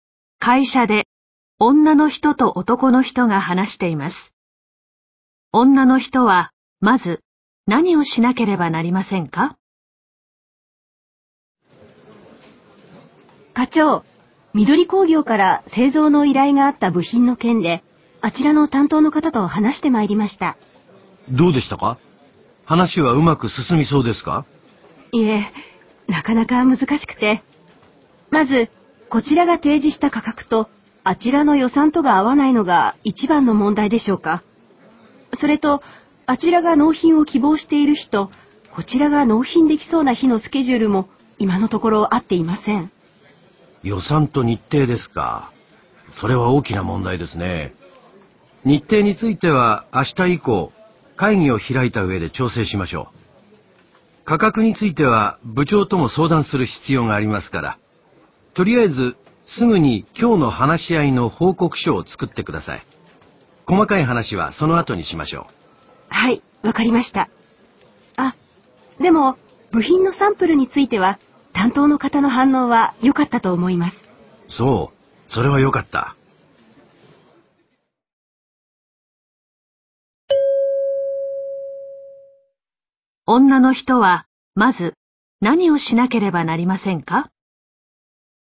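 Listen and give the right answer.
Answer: 今日の話し合いの報告書を作る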